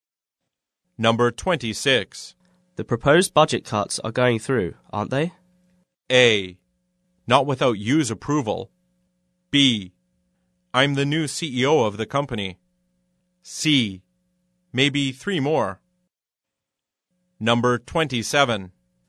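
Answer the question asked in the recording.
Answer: A: Not without you's approval.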